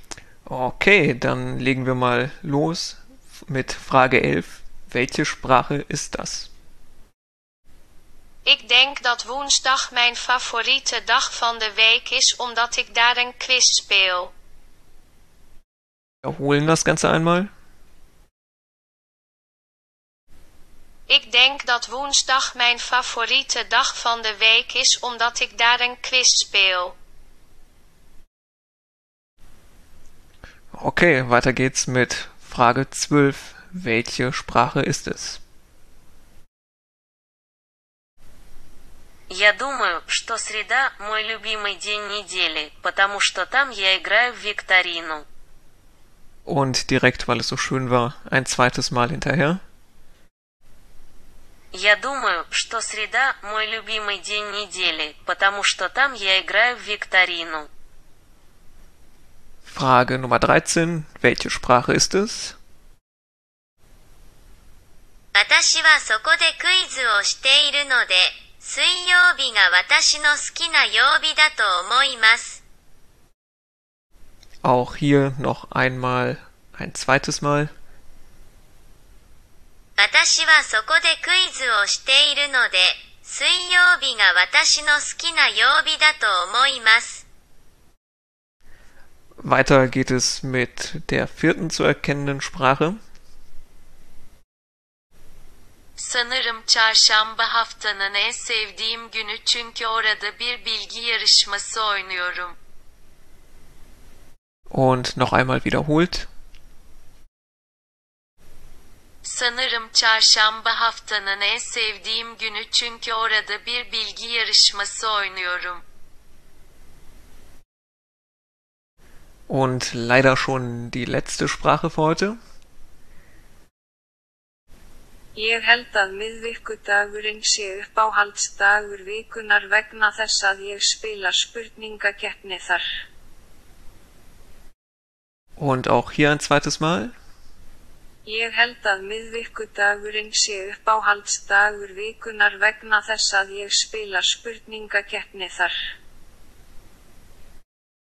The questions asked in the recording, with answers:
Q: Welche Sprache ist es?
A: Lösung 12. Das war Russisch.

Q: Welche Sprache ist es?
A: Lösung 13 war Japanisch.

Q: weiter geht es mit der vierten zu erkennenden Sprache.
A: Lösung Nummer 14 war Türkisch.

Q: Und leider schon die letzte Sprache für heute.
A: Isländisch.